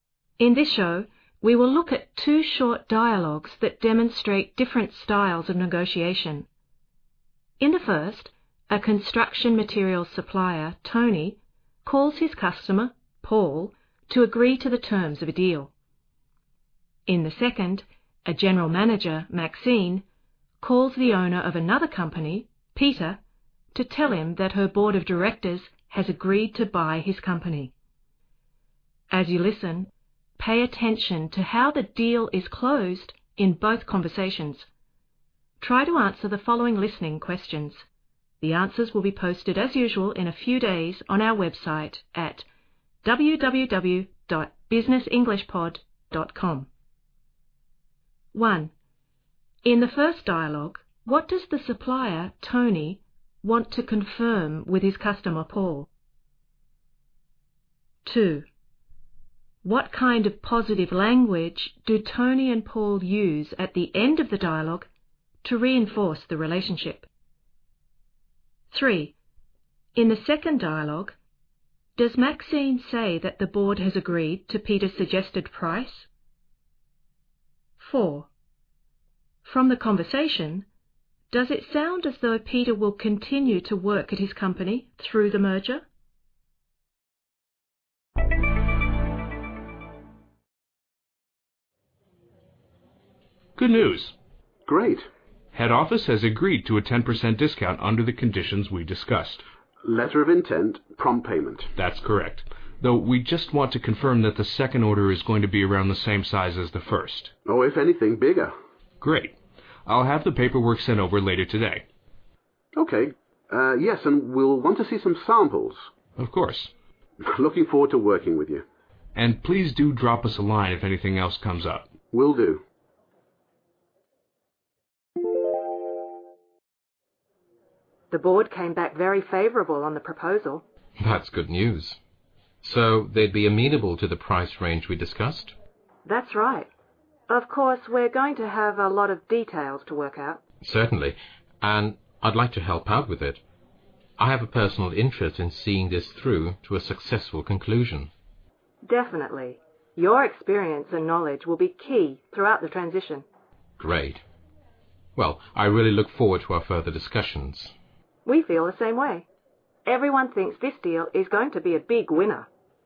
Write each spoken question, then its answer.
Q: In the first dialogue, what does the supplier, Tony, want to confirm with his customer, Paul?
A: Tony wants to confirm that the quantity of the second order will be as large as the first.

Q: What kind of positive language do Tony and Paul use at the end of the dialogue to reinforce the relationship?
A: Paul's phrase, looking forward to working with you, is a simple and sincere expression of goodwill.

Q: From the conversation, does it sound as though Peter will continue to work at his company through the merger?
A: Maxine responds favorably to Peter's suggestion that he should stay involved throughout the merger.